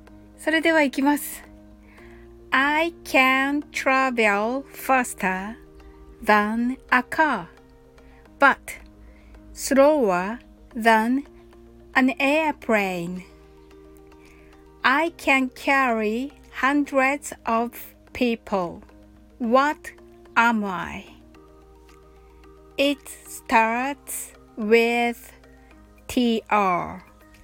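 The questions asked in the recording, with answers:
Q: What am I? It starts with TR.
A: A train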